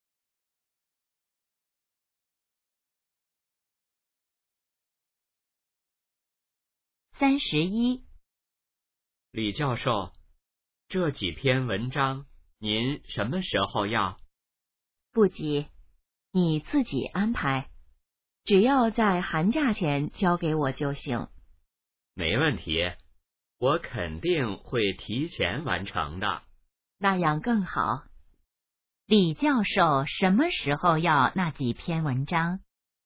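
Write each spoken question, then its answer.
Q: 李教授什么时候要那几篇文章?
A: 寒假前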